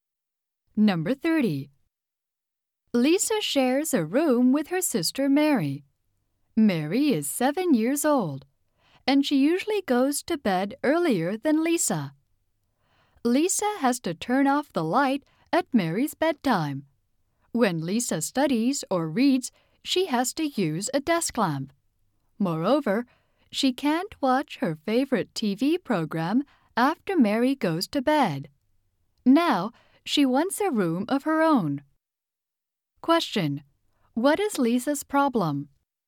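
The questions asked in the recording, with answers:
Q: What is Lisa's problem?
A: She doesn't have her own room, so she can't use the light or watch TV after her sister goes to bed.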